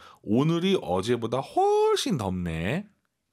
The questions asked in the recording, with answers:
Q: 오늘이 어제보다 훨씬 덥네.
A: 今天比昨天热多了.